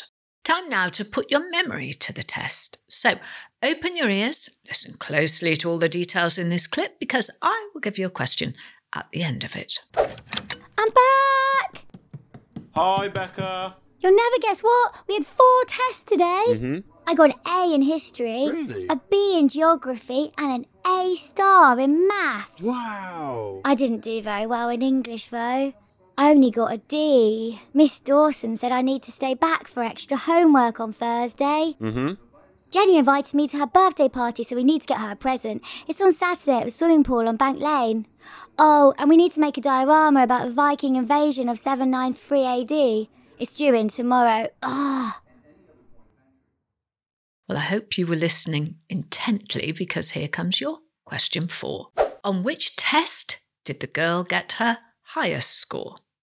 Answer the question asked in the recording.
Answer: The answer was maths.